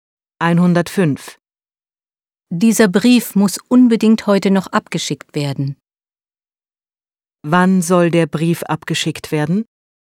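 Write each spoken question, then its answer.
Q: Wann soll der Brief abgeschickt werden?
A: Heute noch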